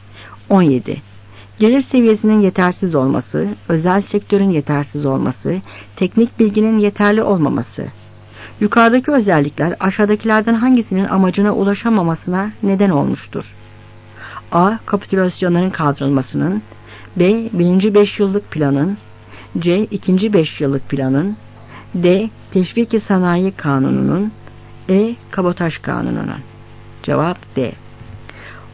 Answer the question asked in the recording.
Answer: Cevap D.